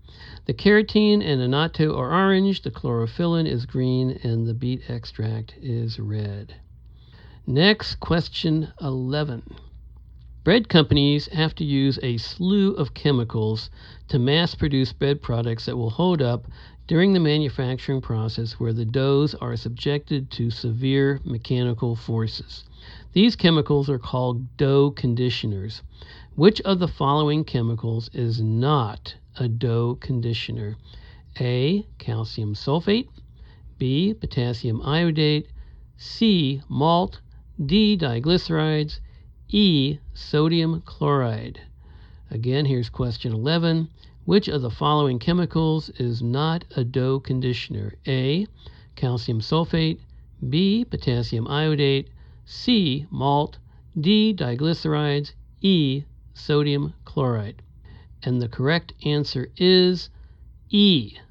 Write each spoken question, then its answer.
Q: Which of the following chemicals is not a dough conditioner?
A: And the correct answer is E. Sodium chloride